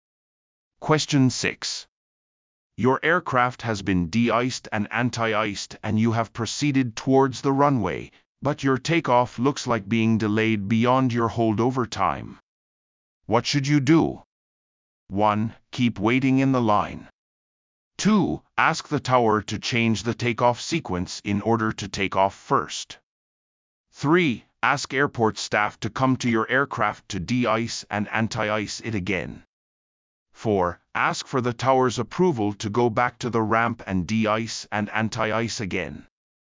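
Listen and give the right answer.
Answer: 4: Ask for the tower's approval to go back to the ramp and de-ice and anti-ice again.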